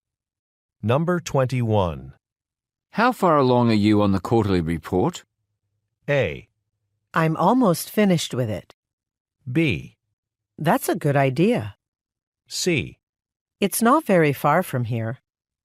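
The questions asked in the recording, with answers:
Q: How far along are you on the quarterly report?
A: A: I'm almost finished with it.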